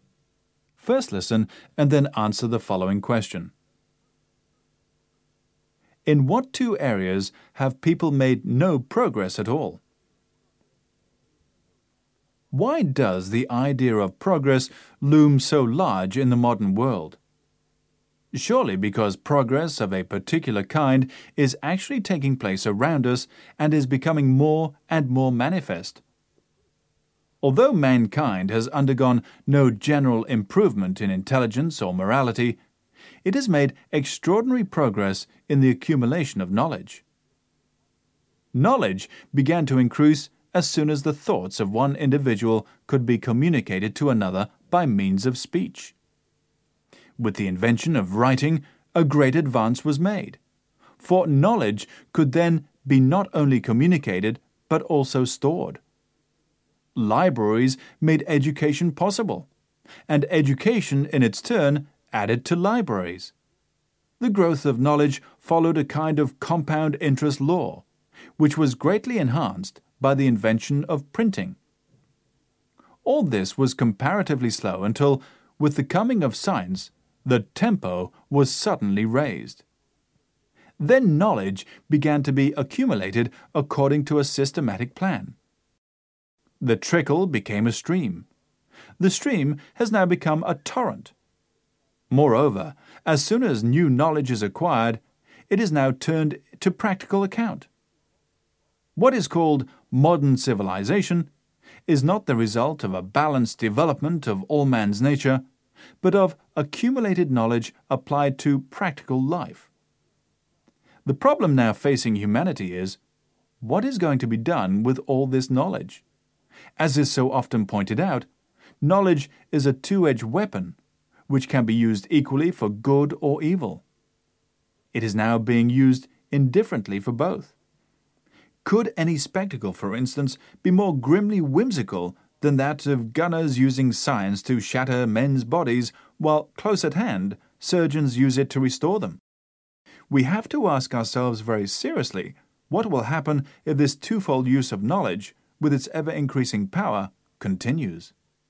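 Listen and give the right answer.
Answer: Intelligence and morality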